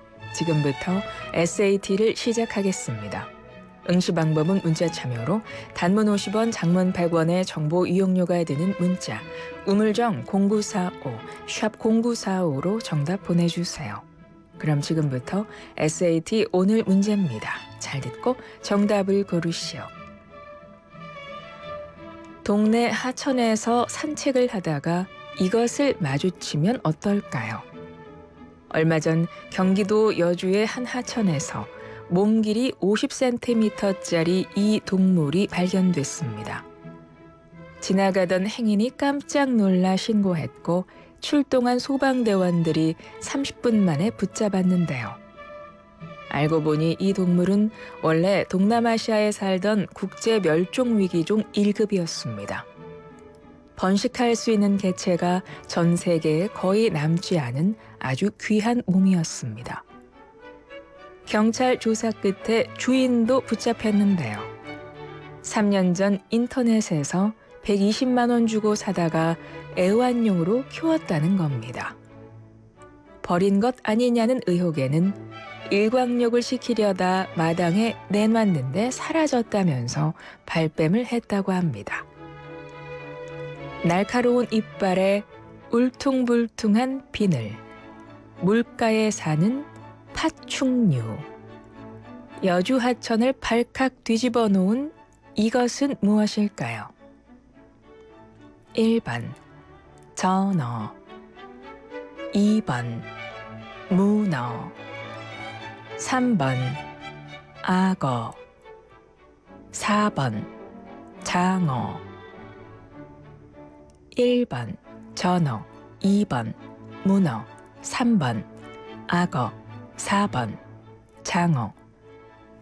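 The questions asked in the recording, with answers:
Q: 날카로운 이빨에 울퉁불퉁한 비늘, 물가에 사는 파충류, 여주 하천을 발칵 뒤집어 놓은 이것은 무엇일까요?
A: 3: 악어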